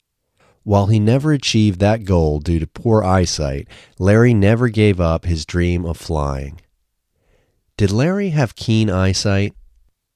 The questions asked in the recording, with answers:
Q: Did Larry have keen eyesight?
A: No, Larry didn't have keen eyesight.